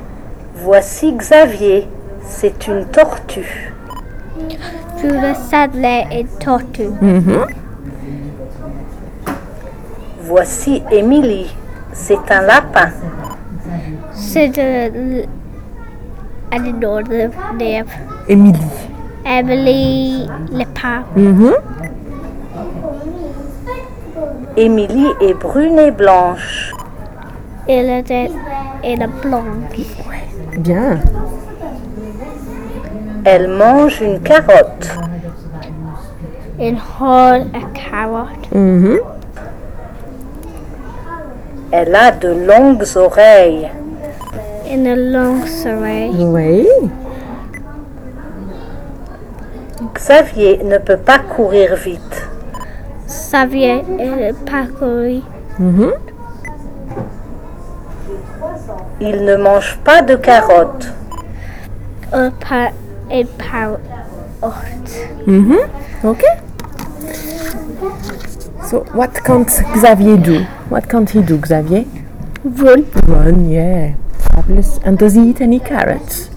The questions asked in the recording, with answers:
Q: So, what can't Xavier do?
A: Run.

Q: And does he eat any carrots?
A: No, he doesn't.